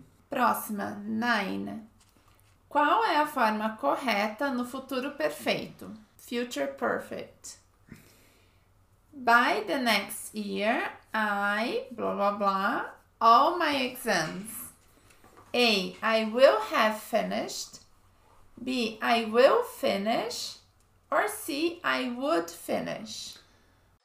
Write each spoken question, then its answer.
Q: Qual é a forma correta no futuro perfeito?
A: Future perfect. A. I will have finished all my exams.